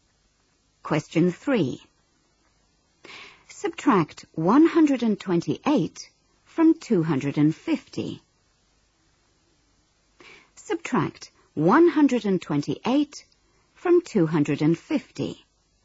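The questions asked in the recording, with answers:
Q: Subtract 128 from 250.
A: 122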